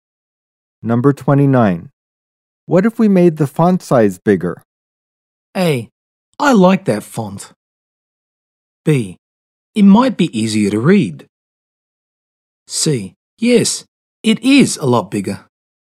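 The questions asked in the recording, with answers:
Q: What if we made the font size bigger?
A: B: It might be easier to read.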